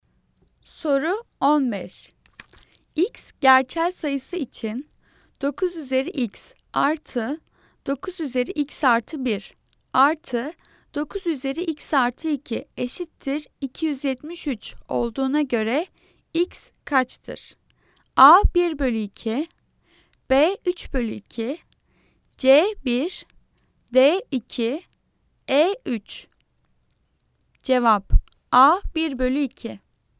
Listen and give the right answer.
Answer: Cevap A 1 bölü 2.